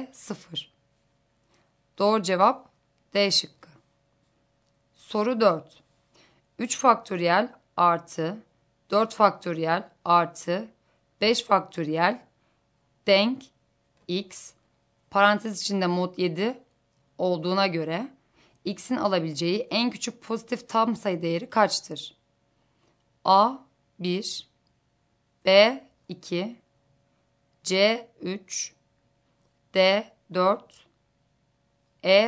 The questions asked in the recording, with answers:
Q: 3 faktöriyel artı 4 faktöriyel artı 5 faktöriyel denk x parantez içinde mod 7 olduğuna göre x'in alabileceği en küçük pozitif tam sayı değeri kaçtır?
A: Doğru cevap C şıkkı.